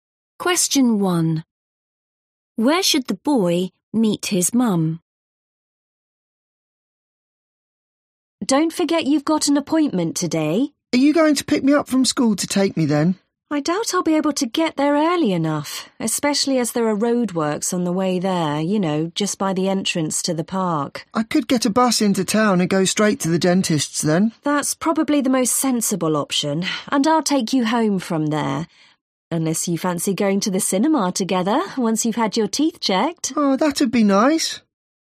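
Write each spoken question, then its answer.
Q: Where should the boy meet his mum?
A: At the dentist's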